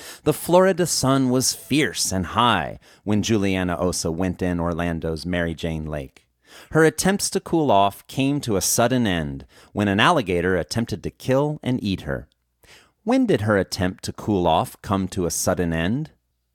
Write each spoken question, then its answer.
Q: When did her attempt to cool off come to a sudden end?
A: Her attempt to cool off came to a sudden end when an alligator attempted to kill and eat her.